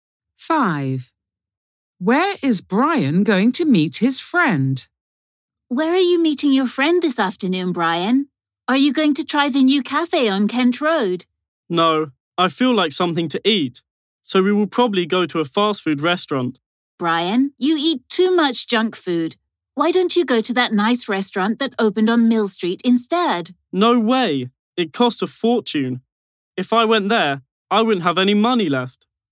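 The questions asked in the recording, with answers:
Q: Where is Brian going to meet his friend?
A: At a fast food restaurant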